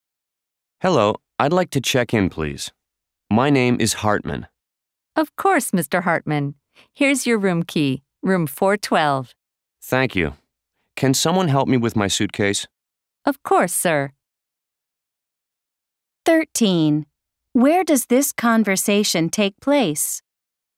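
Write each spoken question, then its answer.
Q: Where does this conversation take place?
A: At a hotel (front desk)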